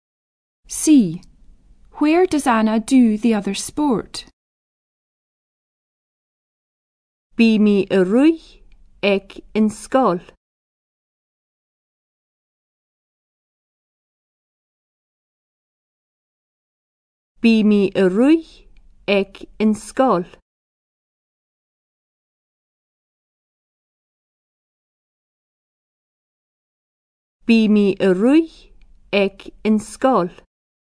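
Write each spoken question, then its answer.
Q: Where does Anna do the other sport?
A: At school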